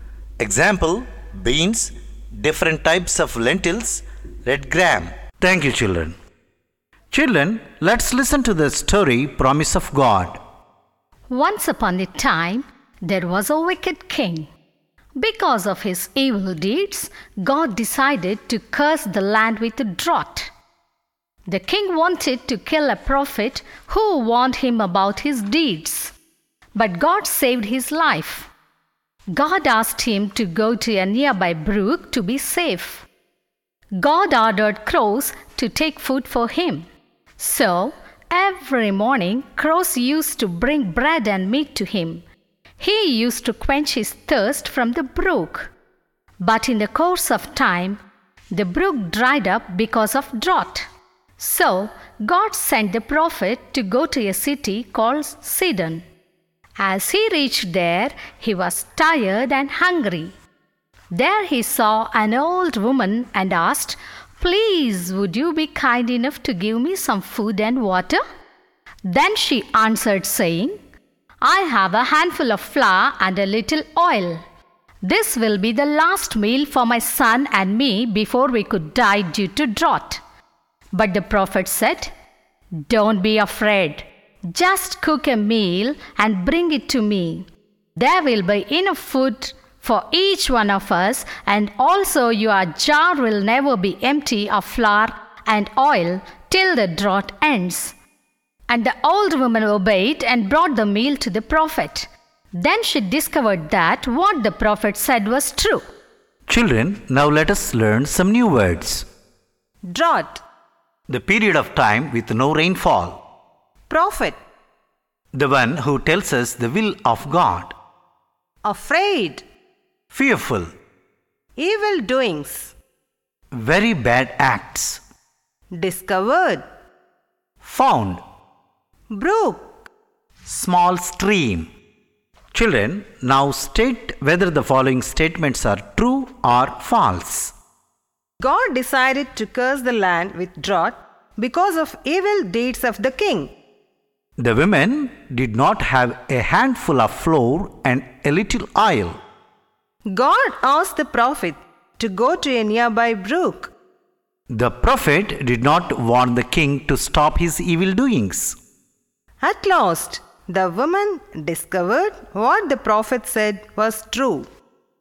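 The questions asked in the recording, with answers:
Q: God decided to curse the land with drought because of evil deeds of the king.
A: True

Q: The women did not have a handful of flour and a little oil.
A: False

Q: God asked the prophet to go to a nearby brook.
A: True

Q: The prophet did not warn the king to stop his evil doings.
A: False

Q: At last, the woman discovered what the prophet said was true.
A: True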